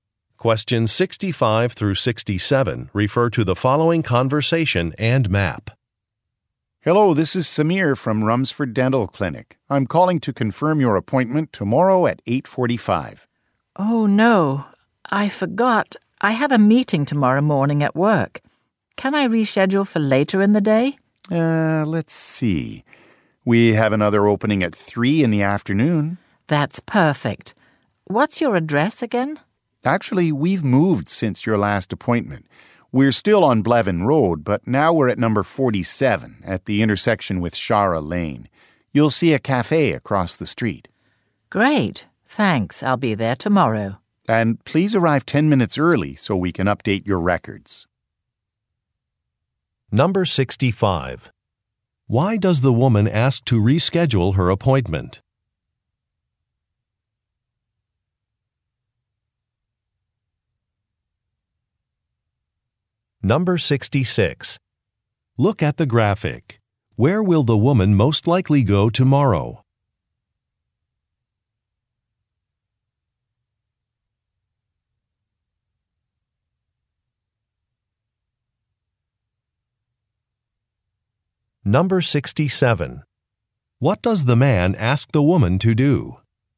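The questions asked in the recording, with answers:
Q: Why does the woman ask to reschedule her appointment?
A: She has a work meeting tomorrow morning

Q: What does the man ask the woman to do?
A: Arrive 10 minutes early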